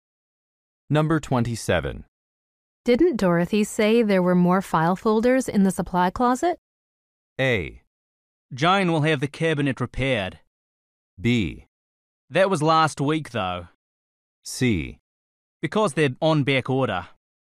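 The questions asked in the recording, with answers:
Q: Didn't Dorothy say there were more file folders in the supply closet?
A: B: That was last week, though.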